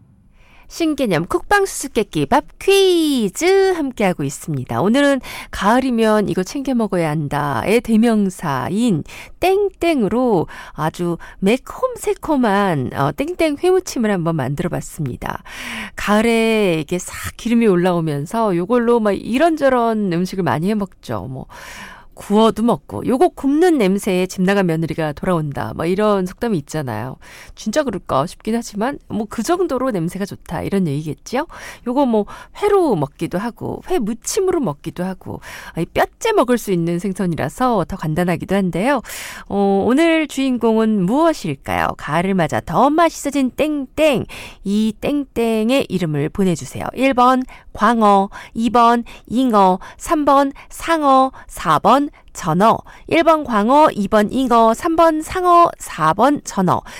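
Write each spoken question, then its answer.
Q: 오늘 주인공은 무엇일까요? 가을을 맞아 더 맛있어진 땡땡.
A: 4: 전어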